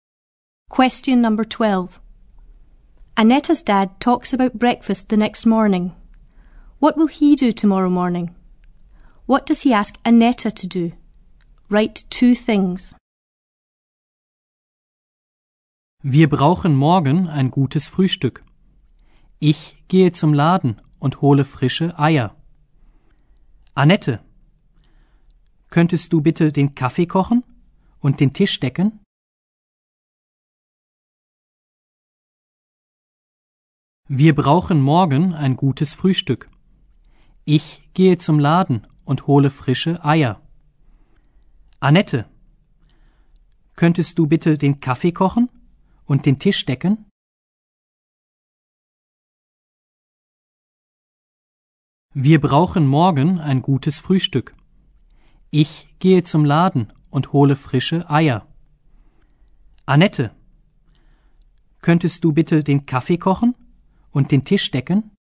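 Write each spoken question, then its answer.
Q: What will he do tomorrow morning?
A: Go to the shop and get fresh eggs

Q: What does he ask Anetta to do?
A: Make the coffee and set the table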